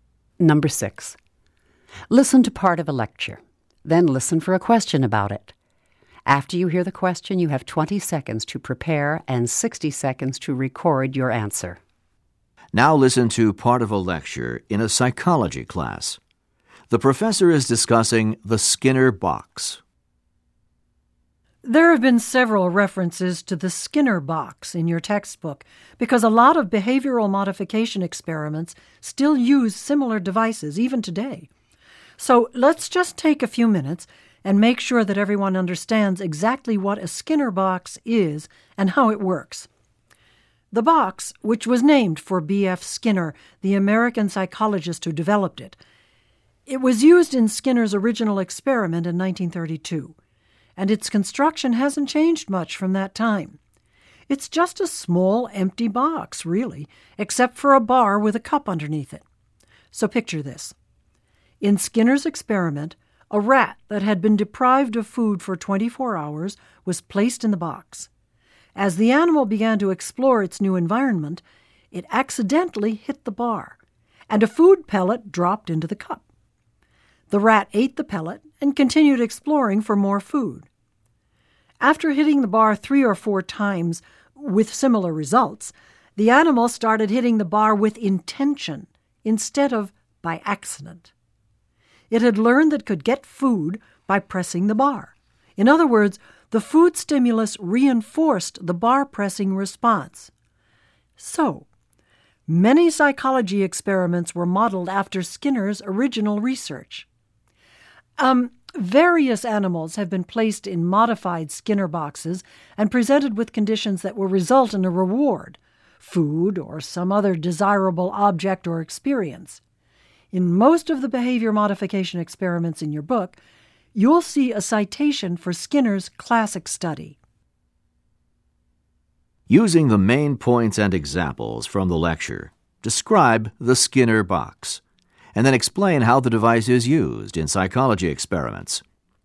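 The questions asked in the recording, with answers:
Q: Using the main points and examples from the lecture, describe the Skinner box, and then explain how the device is used in psychology experiments.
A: It is a small, empty box with a bar and a cup under it. A hungry rat hit the bar by accident, got a food pellet, and learned to press the bar on purpose, because the food reinforced the response. Experiments use modified boxes that reward animals for certain behavior.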